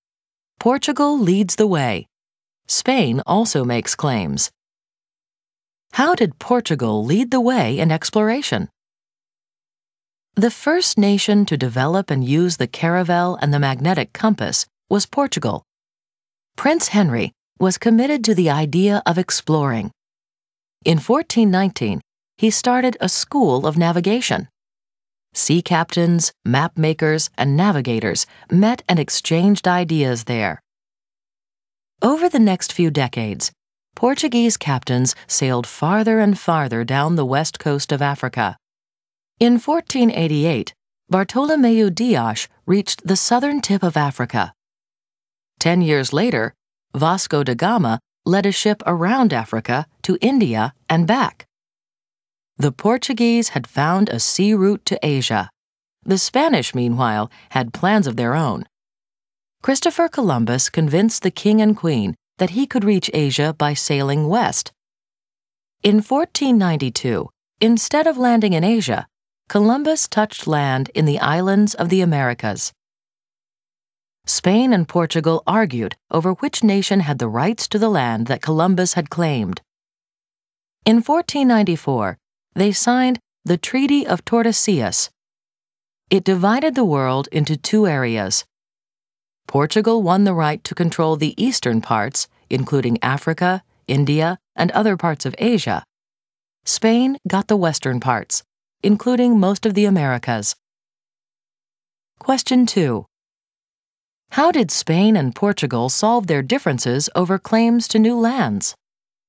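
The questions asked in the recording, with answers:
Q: How did Spain and Portugal solve their differences over claims to new lands?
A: They signed the Treaty of Tordesillas in 1494, which divided the world into two areas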